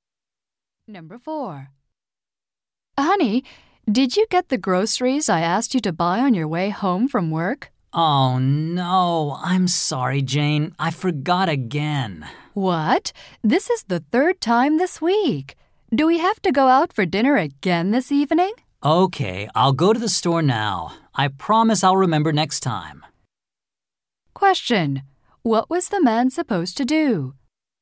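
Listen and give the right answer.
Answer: Buy groceries on his way home from work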